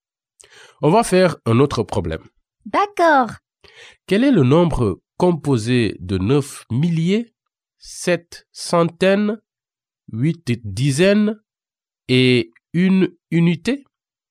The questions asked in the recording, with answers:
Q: Quel est le nombre composé de 9 milliers, 7 centaines, 8 dizaines et une unité?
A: 9781?